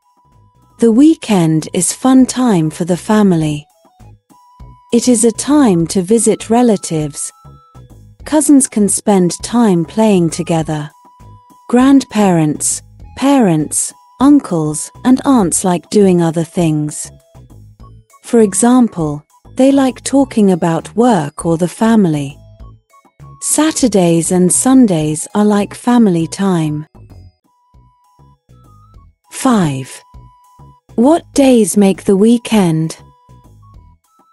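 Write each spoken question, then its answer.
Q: What days make the weekend?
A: Saturday and Sunday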